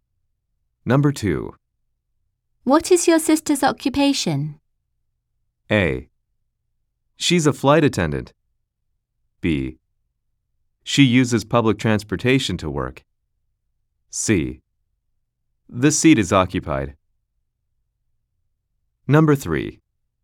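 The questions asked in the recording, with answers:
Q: What is your sister's occupation?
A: A: She's a flight attendant.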